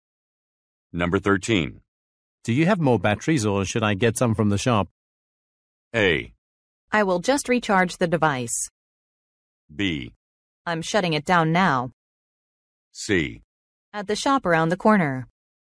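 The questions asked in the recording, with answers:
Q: Do you have more batteries or should I get some from the shop?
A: A: I will just recharge the device.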